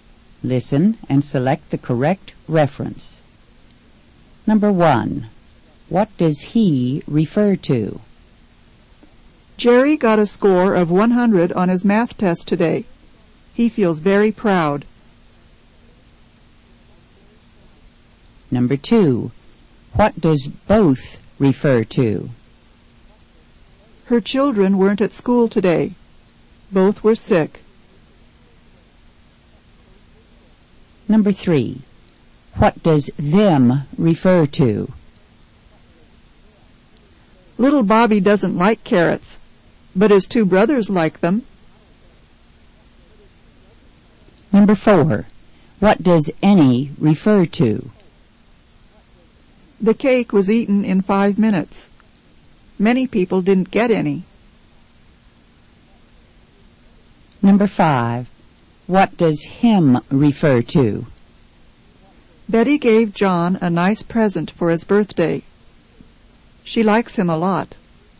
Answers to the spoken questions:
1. Number 1 is A. He refers to Jerry.
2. Number 2 is A. Both refers to her children.
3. Number 3 is B. Them refers to carrots.
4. Number 4 is B. Any refers to cake.
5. Number 5 is A. Him refers to John.